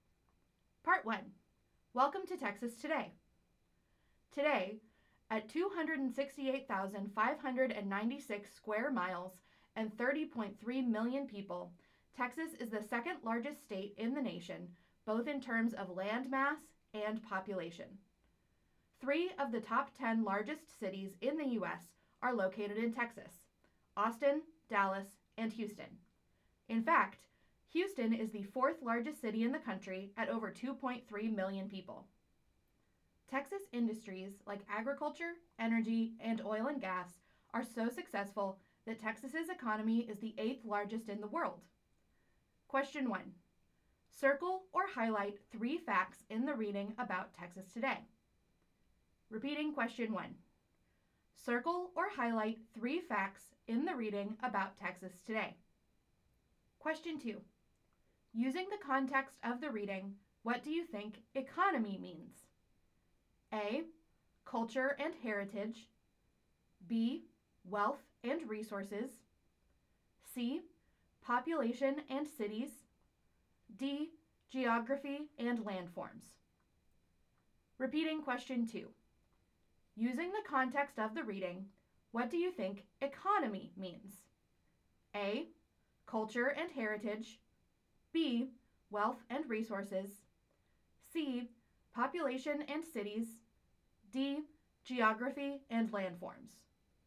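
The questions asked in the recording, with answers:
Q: Using the context of the reading, what do you think economy means?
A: B: Wealth and resources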